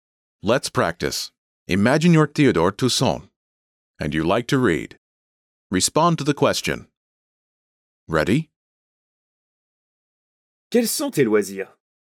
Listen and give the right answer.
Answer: J'aime lire.